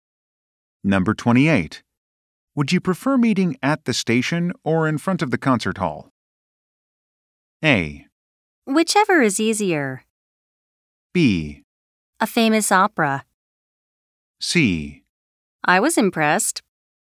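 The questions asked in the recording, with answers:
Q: Would you prefer meeting at the station or in front of the concert hall?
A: A: Whichever is easier.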